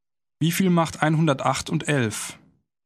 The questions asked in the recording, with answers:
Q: Wie viel macht 108 und 11?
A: 119. Das macht 119.